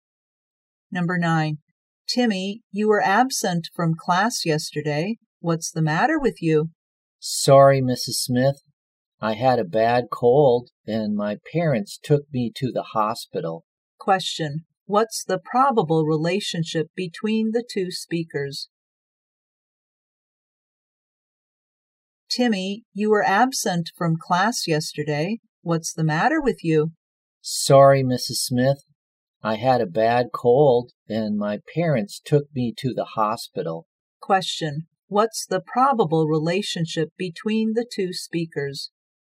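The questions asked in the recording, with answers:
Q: What's the probable relationship between the 2 speakers?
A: Teacher and student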